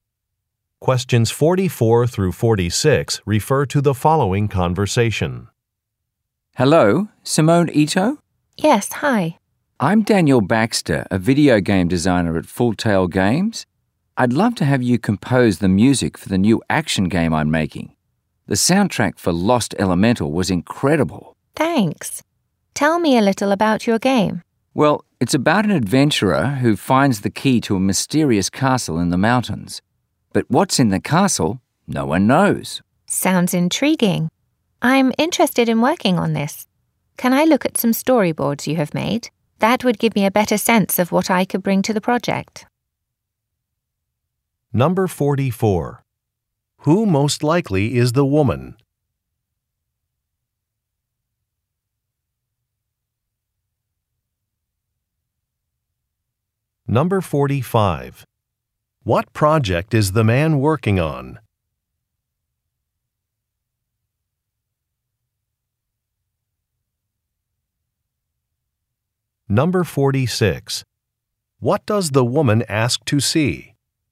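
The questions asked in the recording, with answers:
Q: Who most likely is the woman?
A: A music composer

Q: What project is the man working on?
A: A new action video game

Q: What does the woman ask to see?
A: Storyboards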